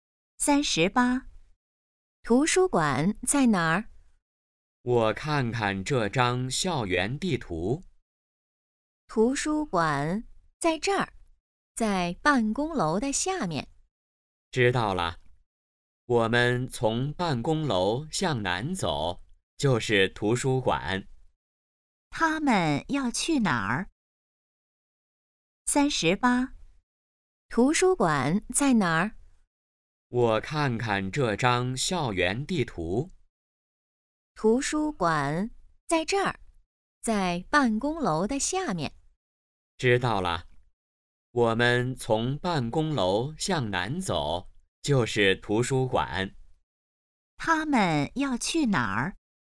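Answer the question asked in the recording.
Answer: 图书馆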